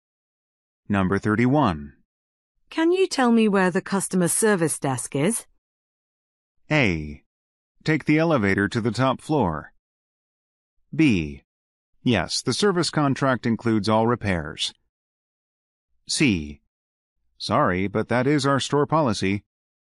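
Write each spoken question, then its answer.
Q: Can you tell me where the customer service desk is?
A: A: Take the elevator to the top floor.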